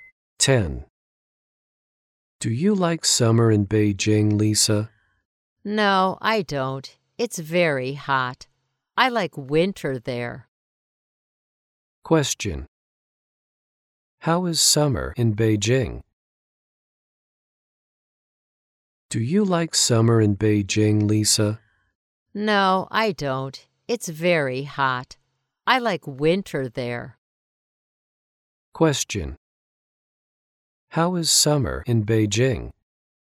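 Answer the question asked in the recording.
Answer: It's very hot.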